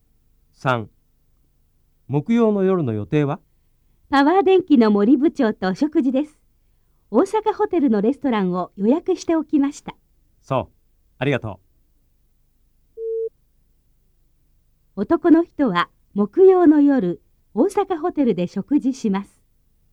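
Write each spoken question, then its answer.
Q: 男の人は、木曜の夜、大阪ホテルで食事します。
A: はい(正しい)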